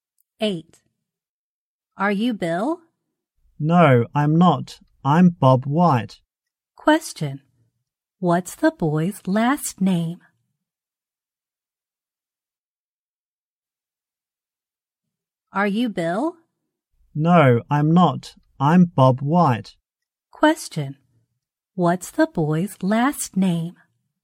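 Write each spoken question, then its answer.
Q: What's the boy's last name?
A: White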